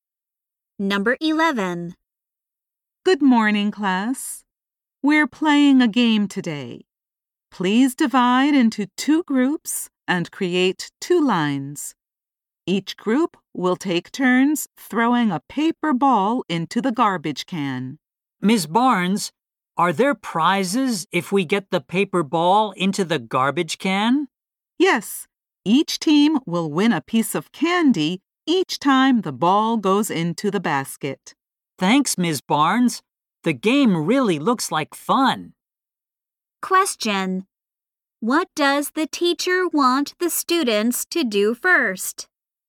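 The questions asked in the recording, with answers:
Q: What does the teacher want the students to do first?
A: Divide into two groups and make two lines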